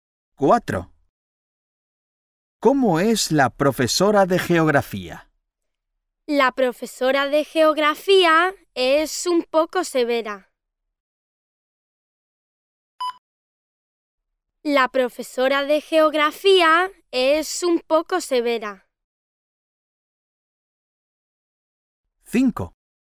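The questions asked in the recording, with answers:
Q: ¿Cómo es la profesora de geografía?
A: un poco severa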